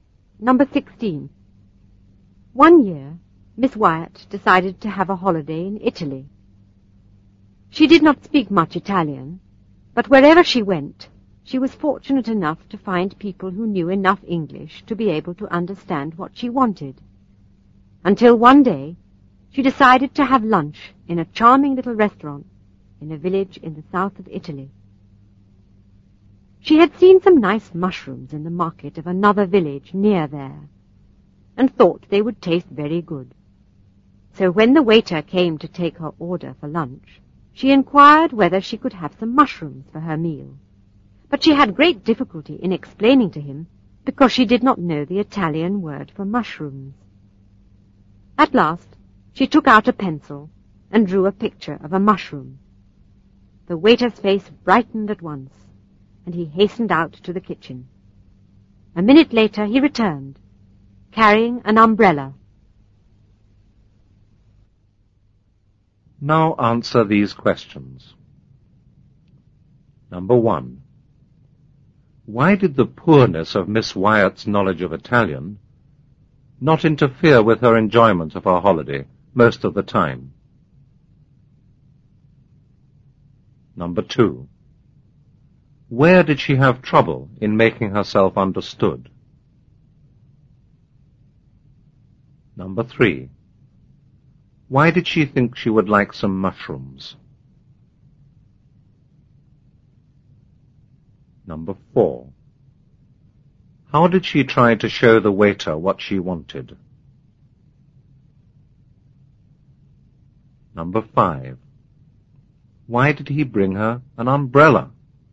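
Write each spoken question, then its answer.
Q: Why did the poorness of Miss Wyatt's knowledge of Italian not interfere with her enjoyment of her holiday most of the time?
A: Wherever she went, she found people who knew enough English to understand what she wanted.

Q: Where did she have trouble in making herself understood?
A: In a little restaurant in a village in the south of Italy.

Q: Why did she think she would like some mushrooms?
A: She had seen some nice mushrooms in the market of a nearby village.

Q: How did she try to show the waiter what she wanted?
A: She drew a picture of a mushroom.

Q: Why did he bring her an umbrella?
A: He thought her drawing of a mushroom was a picture of an umbrella.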